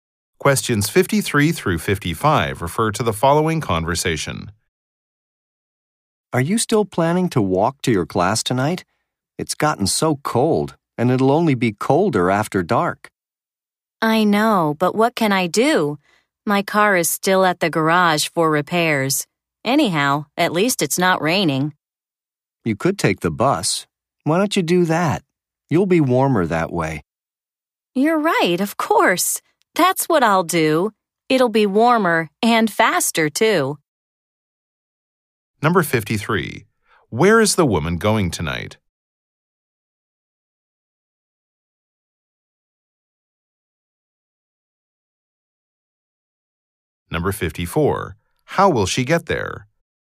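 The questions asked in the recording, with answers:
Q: going tonight?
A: To her class

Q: How will she get there?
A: By bus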